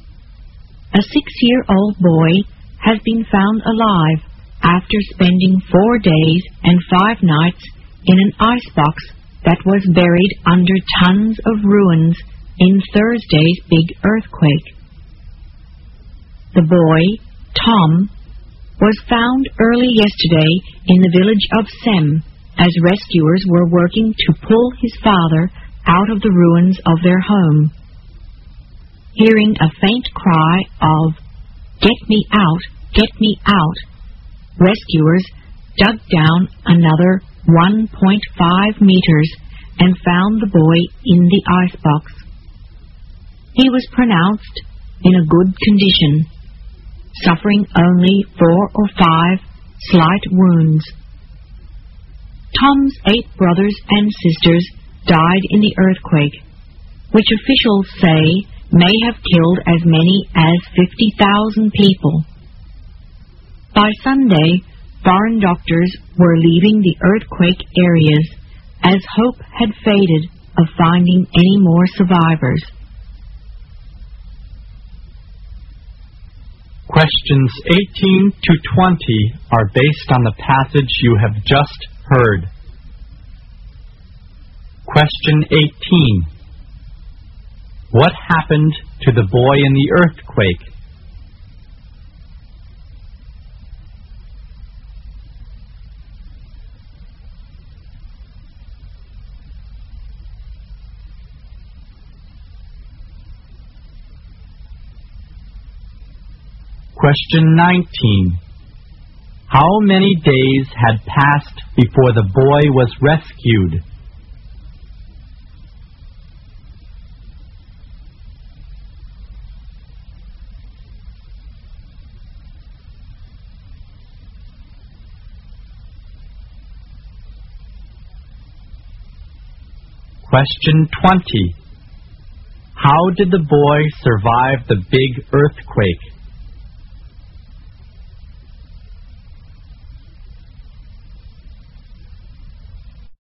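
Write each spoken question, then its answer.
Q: How many days had passed before the boy was rescued?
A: 4 days and 5 nights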